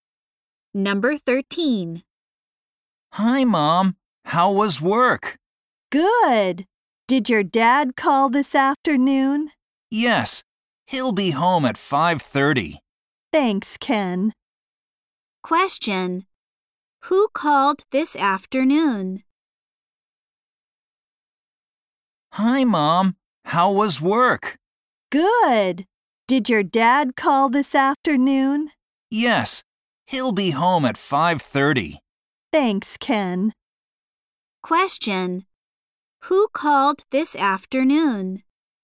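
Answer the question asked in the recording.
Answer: Ken's dad.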